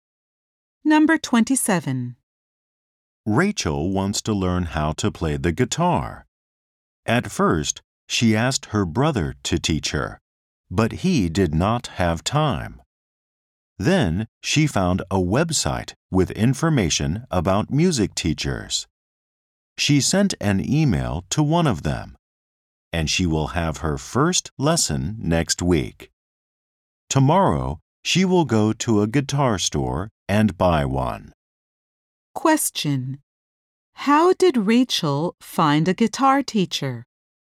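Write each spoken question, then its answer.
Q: How did Rachel find a guitar teacher?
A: She found one on a website with information about music teachers.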